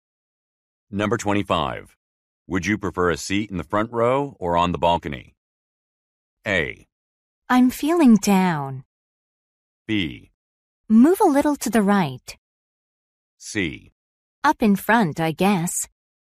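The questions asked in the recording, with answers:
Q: Would you prefer a seat in the front row or on the balcony?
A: C: Up in front, I guess.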